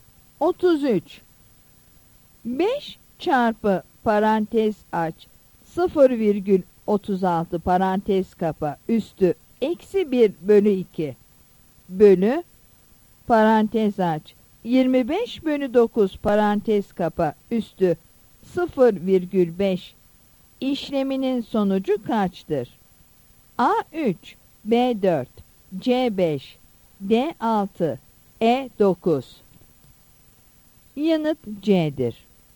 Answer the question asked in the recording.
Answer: Yanıt C'dir.